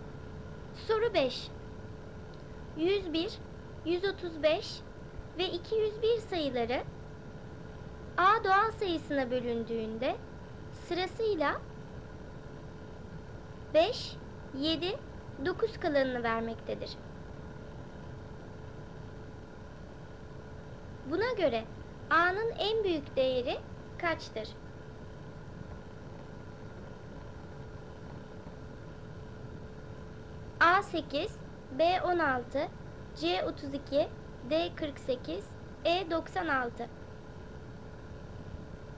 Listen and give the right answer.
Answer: Doğru cevap C 32.